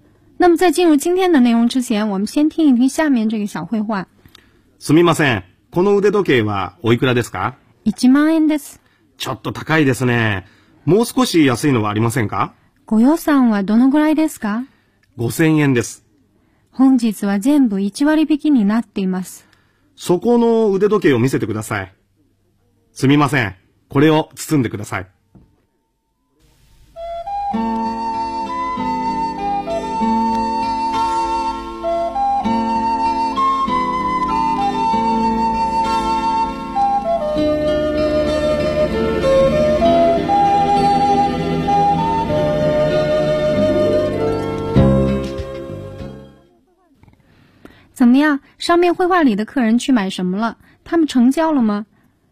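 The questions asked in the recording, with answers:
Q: 上面绘画里的客人去买什么了?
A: 手表

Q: 他们成交了吗?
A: 成交了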